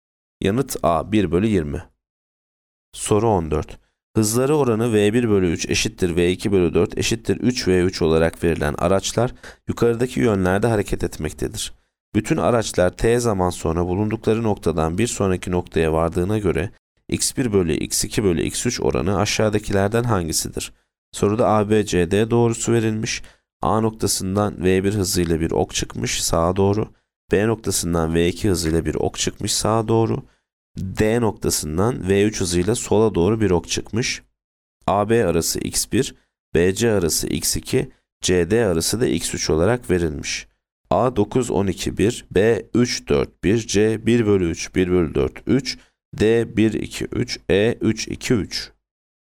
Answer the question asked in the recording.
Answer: Yanıt A 9 12 1.